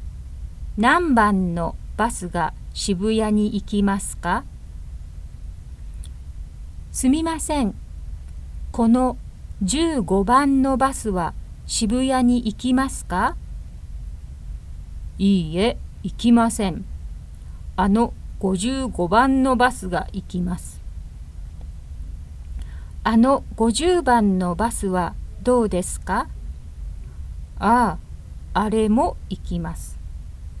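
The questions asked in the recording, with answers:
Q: 何番のバスが渋谷に行きますか?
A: 55番と50番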